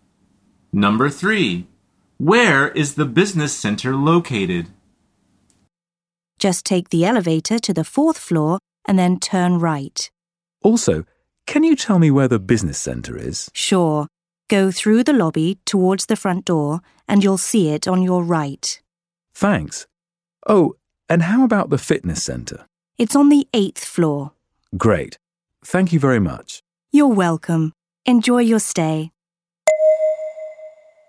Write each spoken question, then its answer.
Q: Where is the business center located?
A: The answer is through the lobby on the right side.